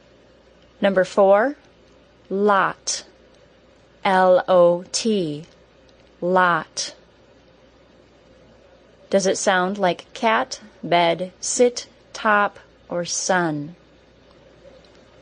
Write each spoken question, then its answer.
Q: Does it sound like cat, bed, sit, top, or sun?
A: Lot is the short O, like the word top.